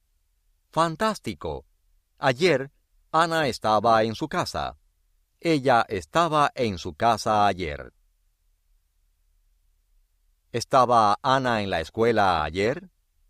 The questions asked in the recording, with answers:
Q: ¿Estaba Ana en la escuela ayer?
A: No.